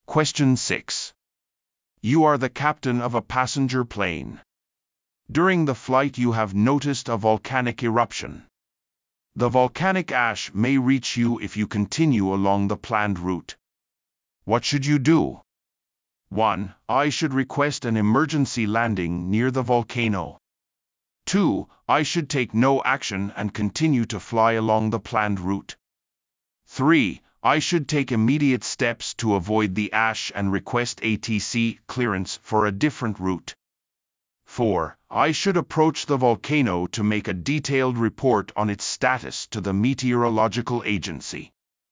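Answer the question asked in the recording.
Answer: 3: I should take immediate steps to avoid the ash and request ATC clearance for a different route.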